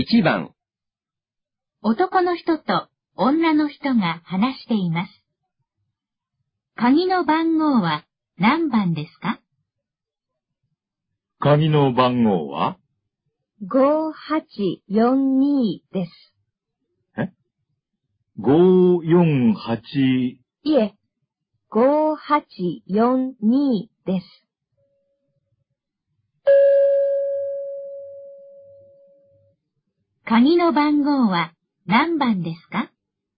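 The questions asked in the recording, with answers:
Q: 鍵の番号は何番ですか?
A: 5842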